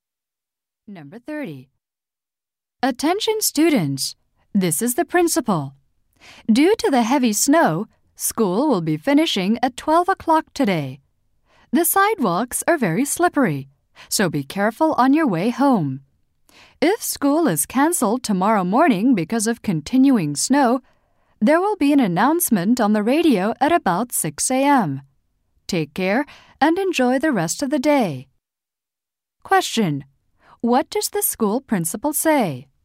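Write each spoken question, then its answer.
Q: What does the school principal say?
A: School will finish at 12 o'clock today because of the snow.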